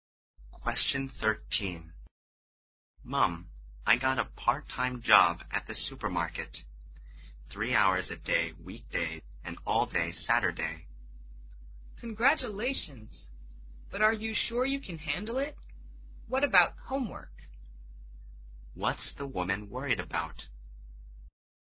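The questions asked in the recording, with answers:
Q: What's the woman worried about?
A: That the job will leave him no time for homework.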